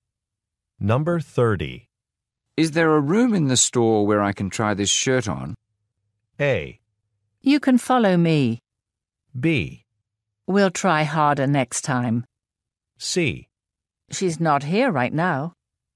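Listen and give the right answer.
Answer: A: You can follow me.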